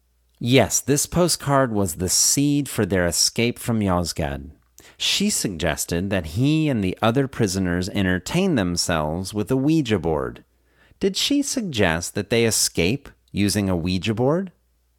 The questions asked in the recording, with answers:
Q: Did she suggest that they escape using a Ouija board?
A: No, she didn't suggest they escape using a Ouija board.